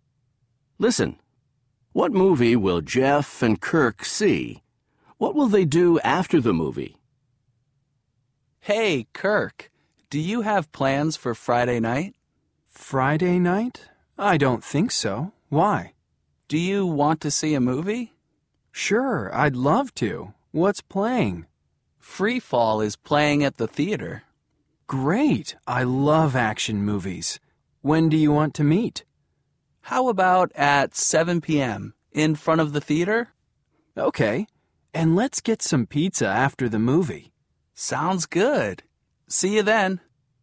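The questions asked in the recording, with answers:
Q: What movie will Jeff and Kirk see?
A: Free Fall

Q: What will they do after the movie?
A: Get some pizza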